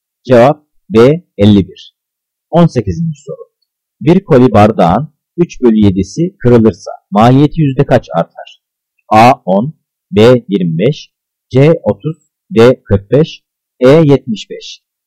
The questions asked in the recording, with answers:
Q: Bir koli bardağın 3/7'si kırılırsa maliyeti yüzde kaç artar?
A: Cevap E 75.